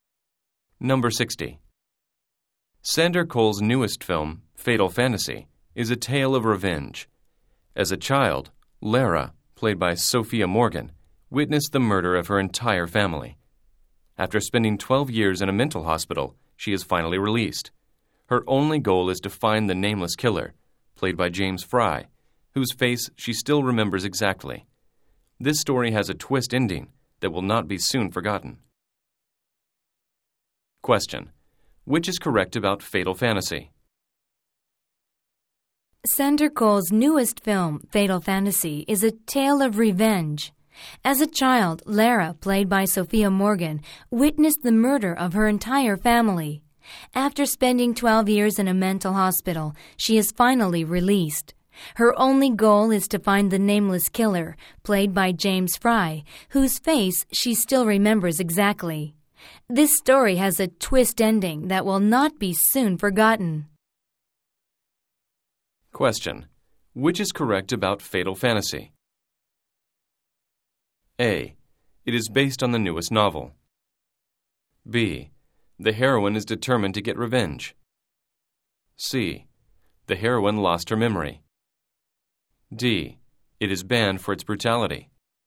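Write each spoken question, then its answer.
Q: which is correct about Fatal Fantasy?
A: B: The heroine is determined to get revenge.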